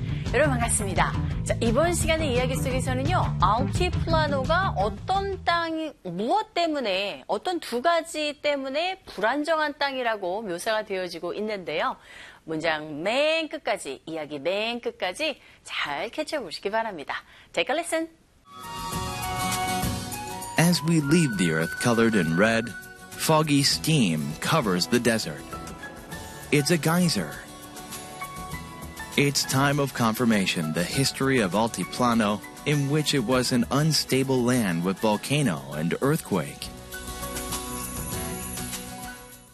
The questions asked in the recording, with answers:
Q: 알티플라노가 어떤 땅이 무엇 때문에 어떤 두 가지 때문에 불안정한 땅이라고 묘사가 되어지고 있는데요.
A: 화산과 지진 때문에 불안정한 땅이었다고 합니다.